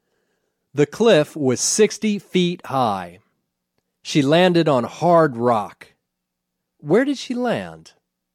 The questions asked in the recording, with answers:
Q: Where did she land?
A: She landed on a hard rock.